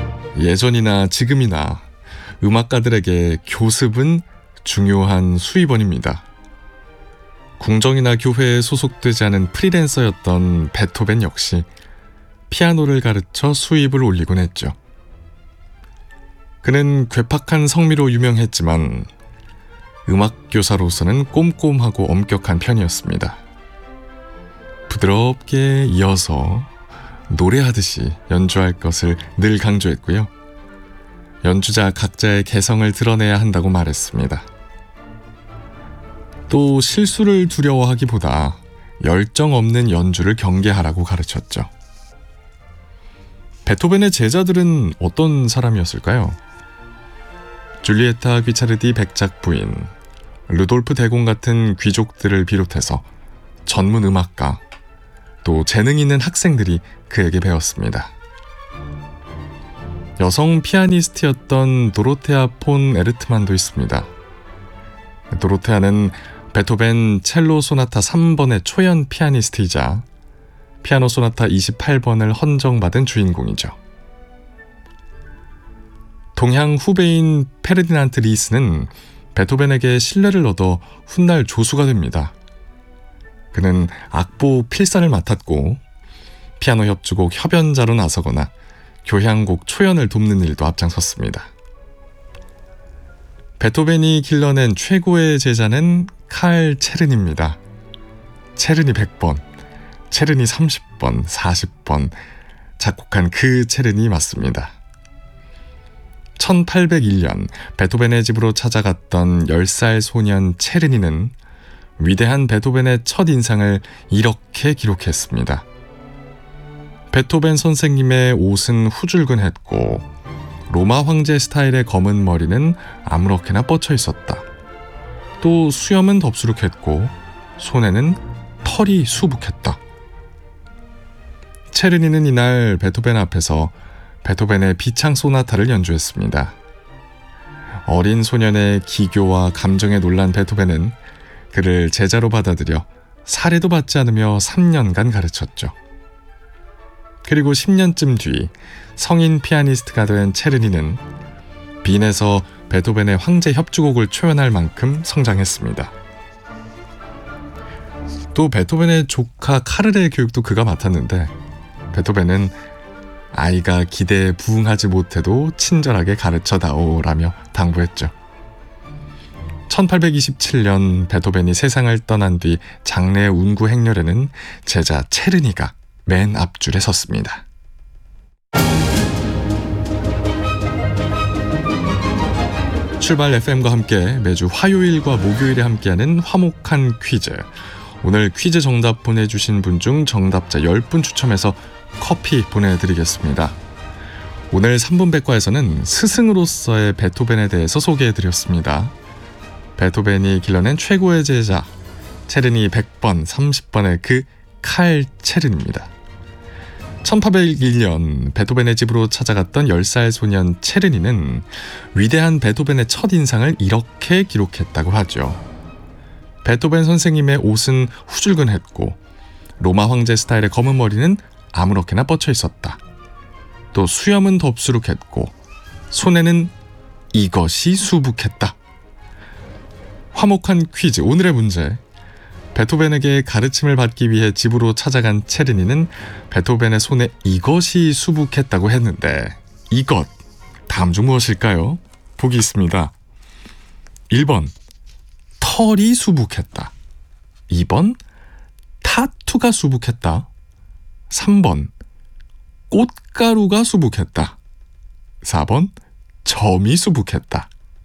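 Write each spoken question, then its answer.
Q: 베토벤에게 가르침을 받기 위해 집으로 찾아간 체르니는 베토벤의 손에 이것이 수북했다고 했는데 이것 다음 중 무엇일까요?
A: 1번: 털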